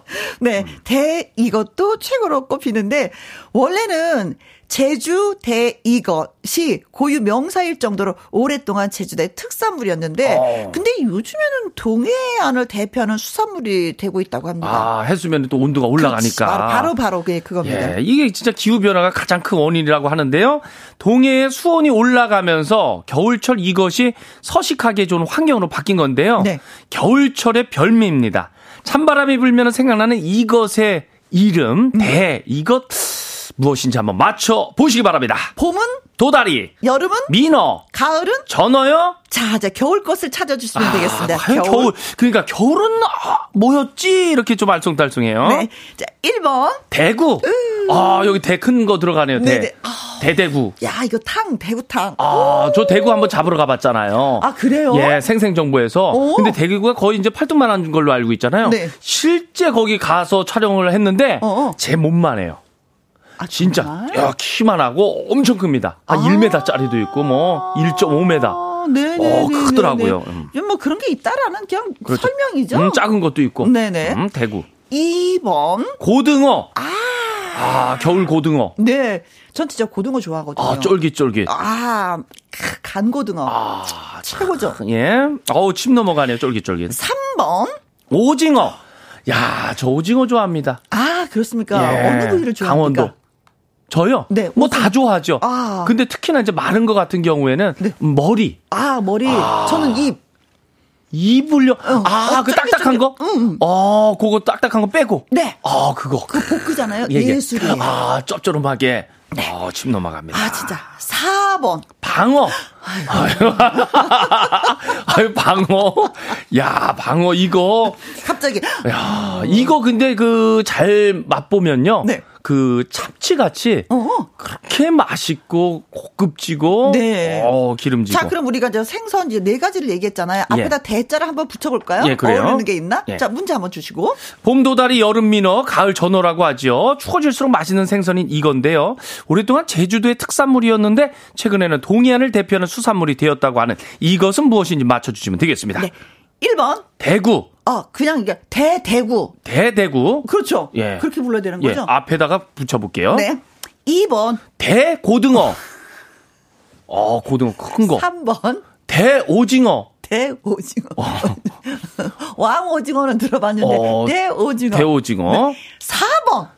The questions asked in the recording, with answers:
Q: 추워질수록 맛있는 생선인 이건데요. 오랫동안 제주도의 특산물이었는데 최근에는 동해안을 대표하는 수산물이 되었다고 하는 이것은 무엇인지 맞춰주시면 되겠습니다.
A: 4번, 방어가 정답이에요.